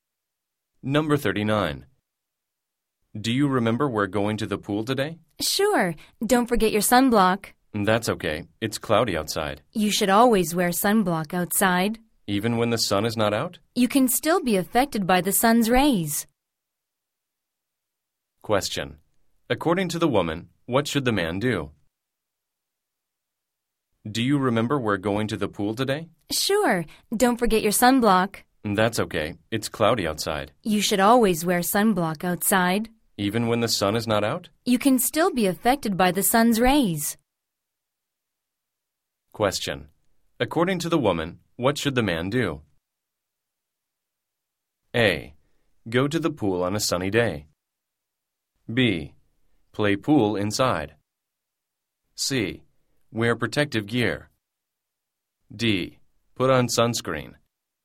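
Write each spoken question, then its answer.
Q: According to the woman, what should the man do?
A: D: Put on sunscreen.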